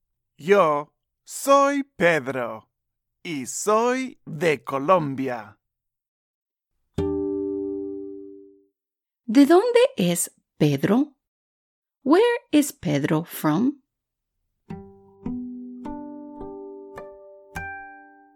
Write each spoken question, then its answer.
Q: ¿De dónde es Pedro? Where is Pedro from?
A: Correcto. Pedro es de Colombia.